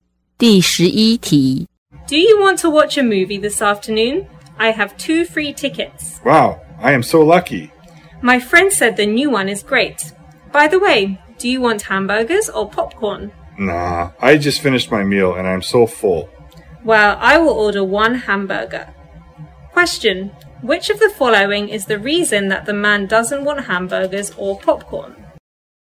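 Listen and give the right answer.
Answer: He just finished his meal and is full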